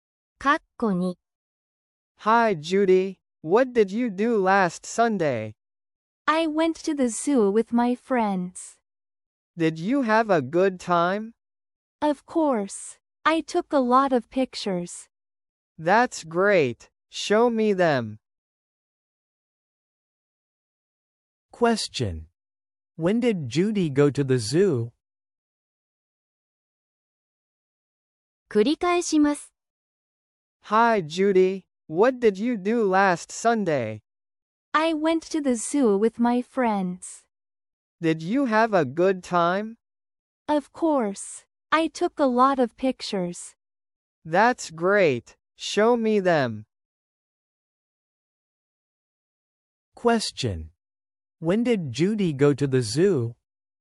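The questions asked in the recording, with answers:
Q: When did Judy go to the zoo?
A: Last Sunday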